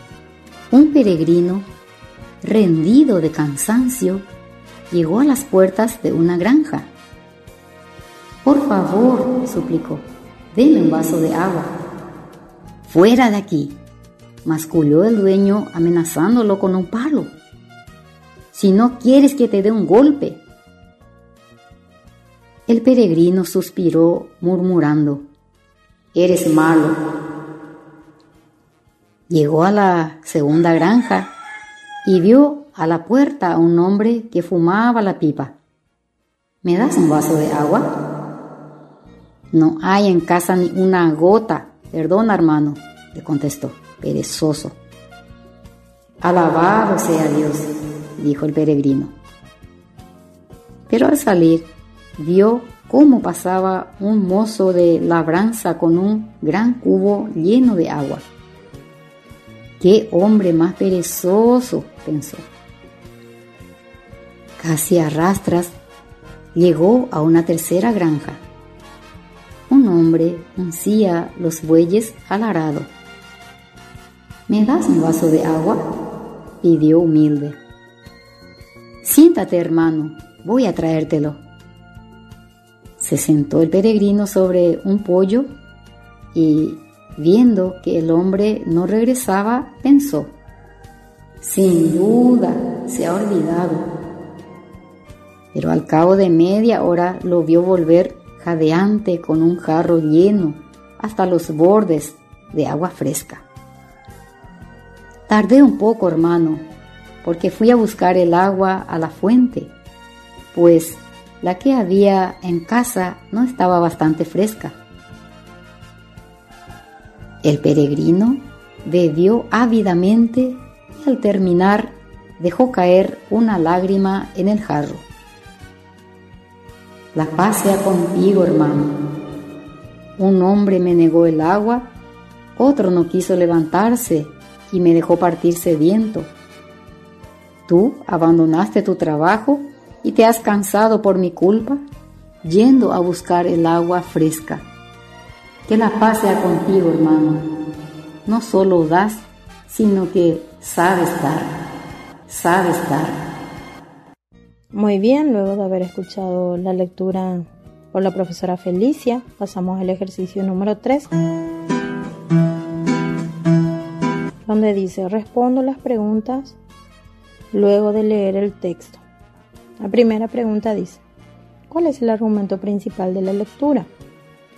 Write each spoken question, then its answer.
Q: ¿cuál es el argumento principal de la lectura?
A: Habla del peregrino que salió en busca de agua.